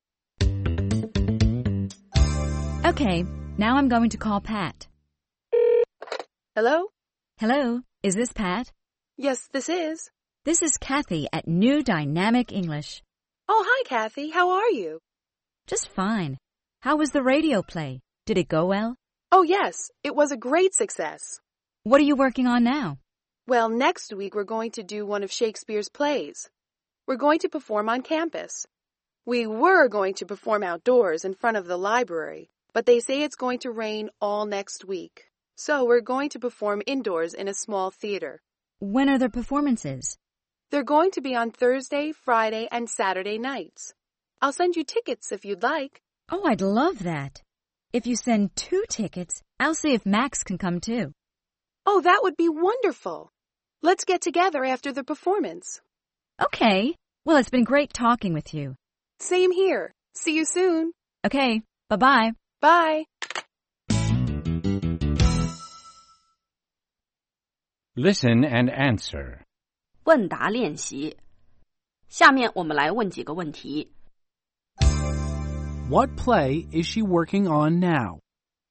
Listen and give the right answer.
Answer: She's working on a play by Shakespeare.